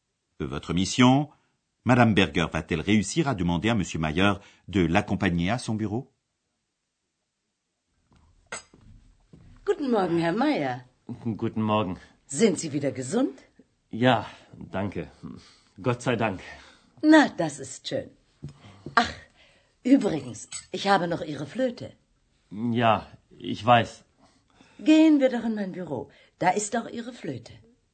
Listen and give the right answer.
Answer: Vous avez certainement remarqué que Madame Berger s'est invitée Monsieur Mayer dans son bureau en lui disant que c'est là qu'elle y a sa flûte.